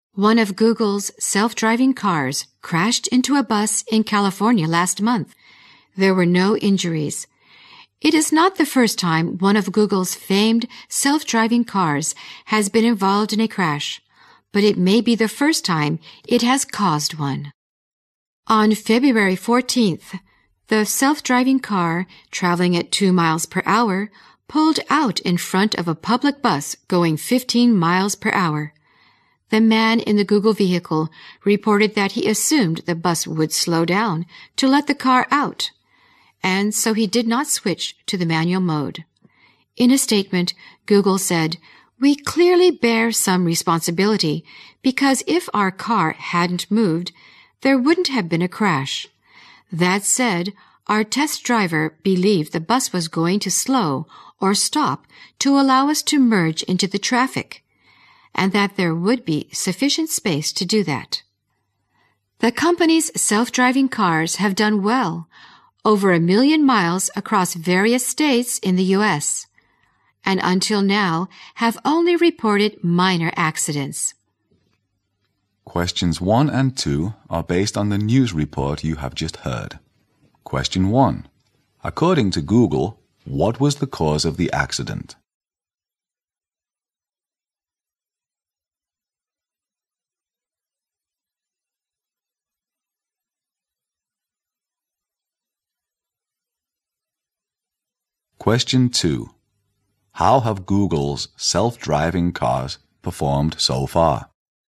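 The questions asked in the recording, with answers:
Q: According to Google, what was the cause of the accident?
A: Its car moved out in front of the bus because the test driver assumed the bus would slow down or stop to let it merge

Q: How have Google's self-driving cars performed so far?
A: Well: over 1 million miles with only minor accidents reported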